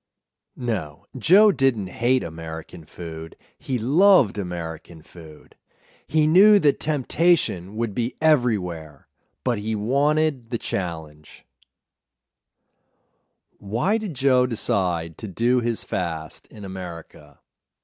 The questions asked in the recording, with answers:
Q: Why did Joe decide to do his fast in America?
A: He decided to do his fast in America because he wanted the challenge.